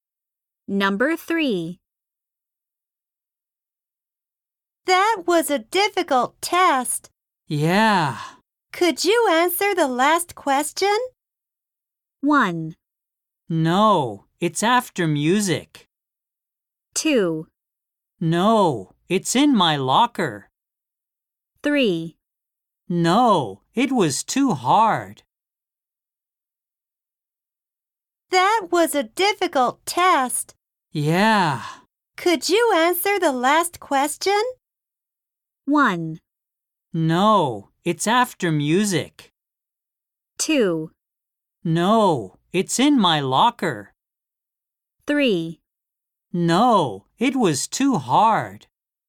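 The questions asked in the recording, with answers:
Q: Could you answer the last question?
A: 3: No, it was too hard.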